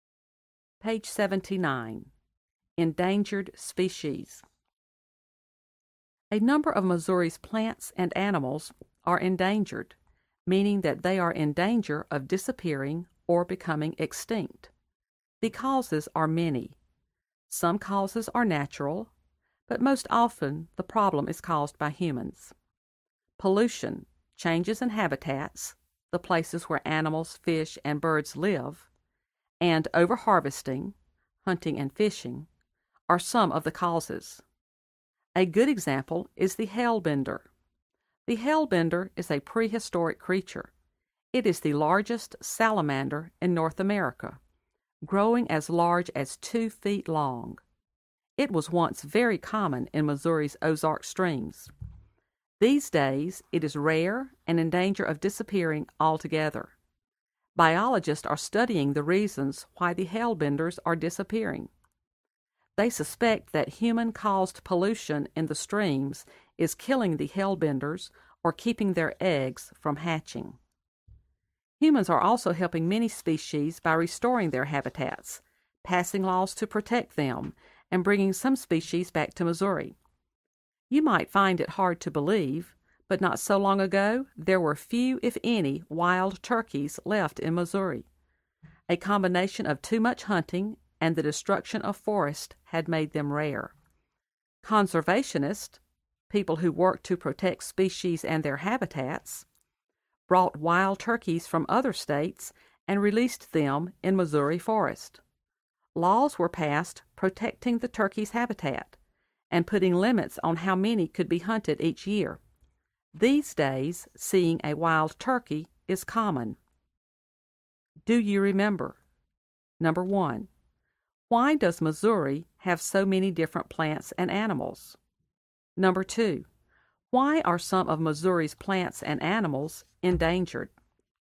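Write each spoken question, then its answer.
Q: why are some of Missouri's plants and animals endangered?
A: Mostly because of humans: pollution, changes in habitats, and over-harvesting (too much hunting and fishing)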